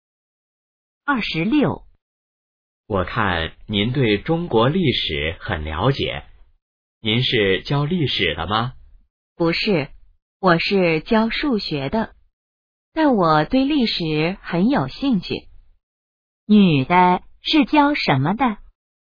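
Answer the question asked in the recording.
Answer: 教数学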